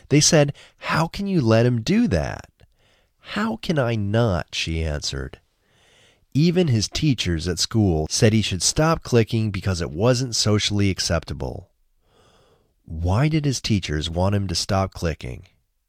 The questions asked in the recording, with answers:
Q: Why did his teachers want him to stop clicking?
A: His teachers wanted him to stop clicking because it wasn't socially acceptable.